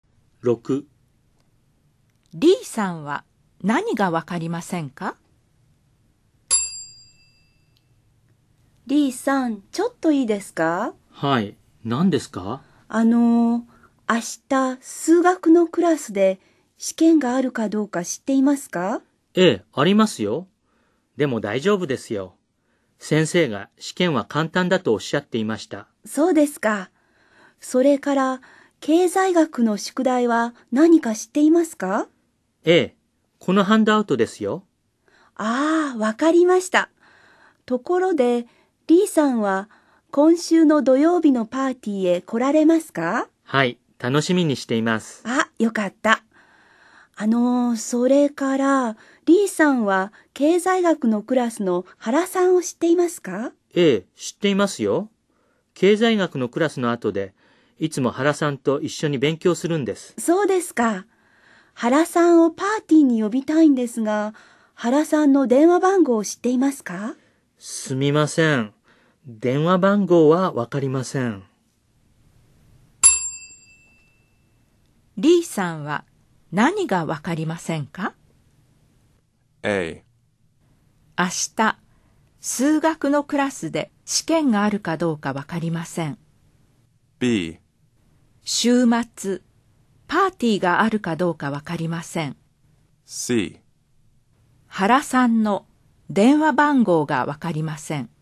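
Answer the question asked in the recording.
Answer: C: 原さんの電話番号がわかりません。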